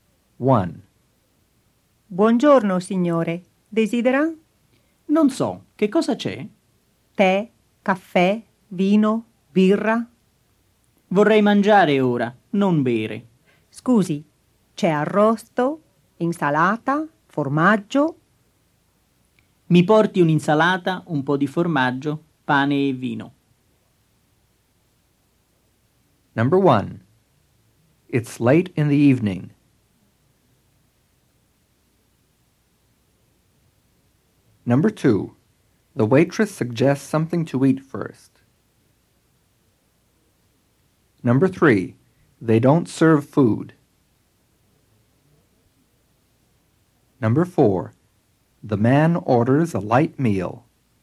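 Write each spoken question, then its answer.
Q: It's late in the evening.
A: False

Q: The waitress suggests something to eat first.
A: False

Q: They don't serve food.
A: False

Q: The man orders a light meal.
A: True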